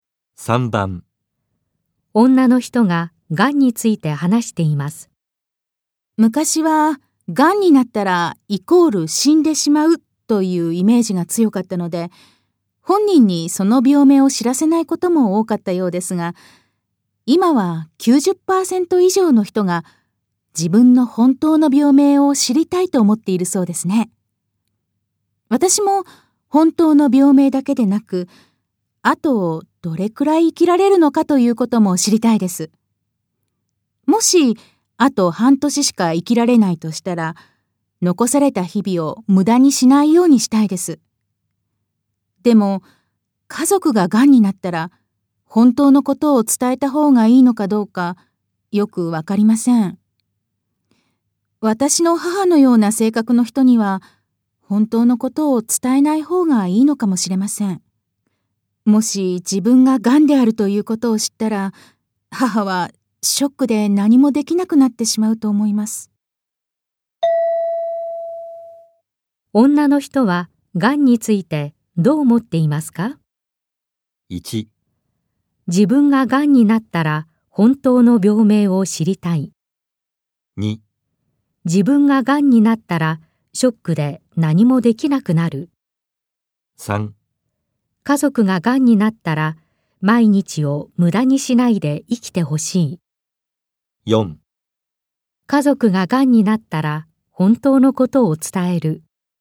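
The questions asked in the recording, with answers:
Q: 女の人は癌についてどう思っていますか?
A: 1: 自分が癌になったら本当の病名を知りたい。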